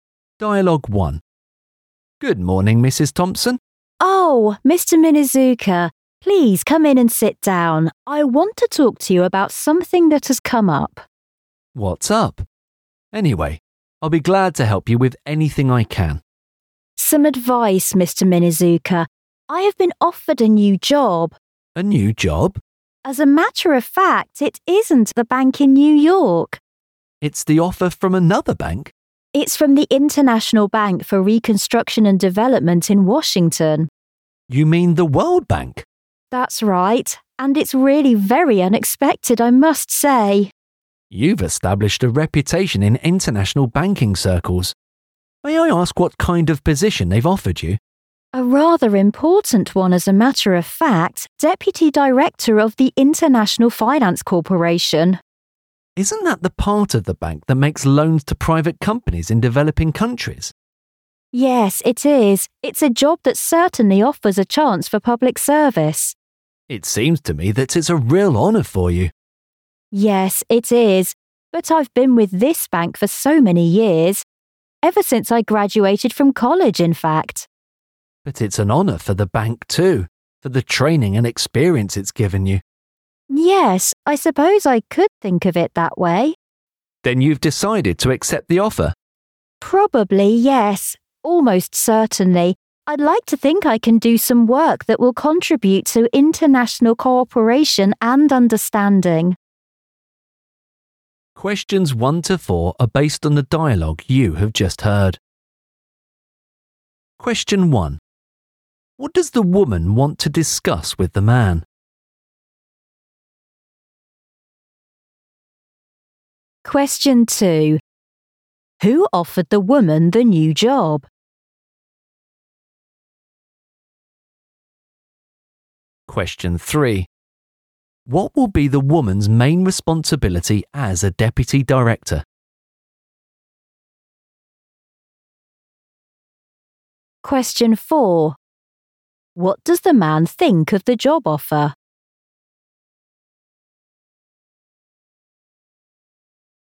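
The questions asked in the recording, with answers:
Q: What does the woman want to discuss with the man?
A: A new job offer she has received

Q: Who offered the woman the new job?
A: The World Bank (International Bank for Reconstruction and Development)

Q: What will be the woman's main responsibility as a deputy director?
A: Making loans to private companies in developing countries

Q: What does the man think of the job offer?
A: It is a real honour for her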